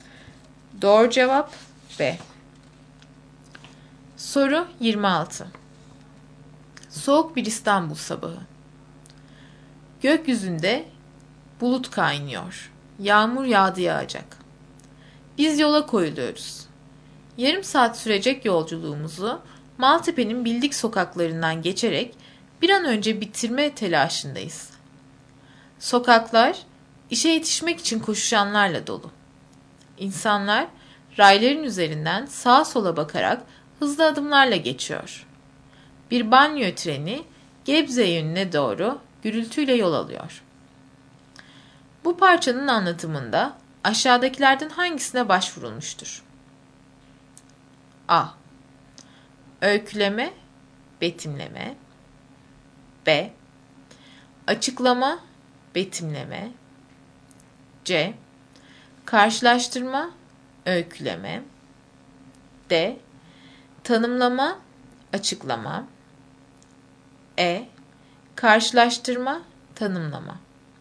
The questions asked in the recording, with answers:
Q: Bu parçanın anlatımında aşağıdakilerden hangisine başvurulmuştur?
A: Doğru cevap A.